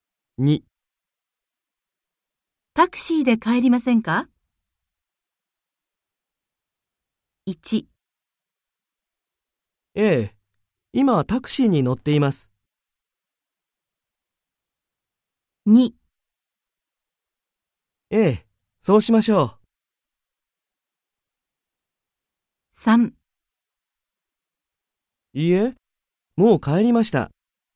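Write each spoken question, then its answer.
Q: タクシーで帰りませんか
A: 2: ええ、そうしましょう。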